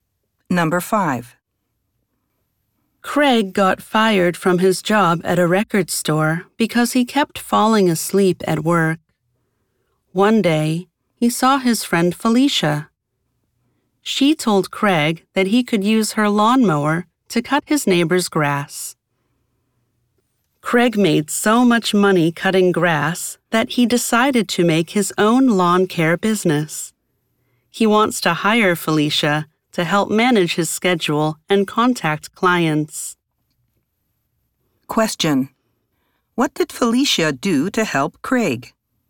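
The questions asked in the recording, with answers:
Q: What did Felicia do to help Craig?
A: She let him use her lawnmower to cut his neighbor's grass.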